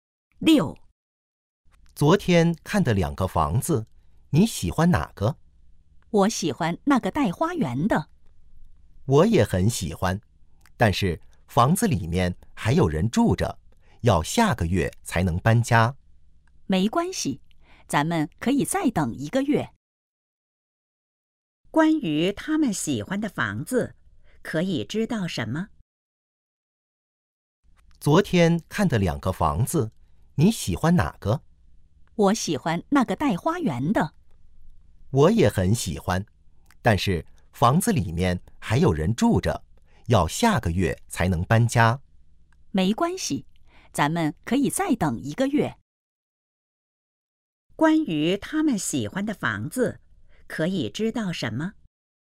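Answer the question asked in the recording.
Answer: 带花园,下个月才能搬进去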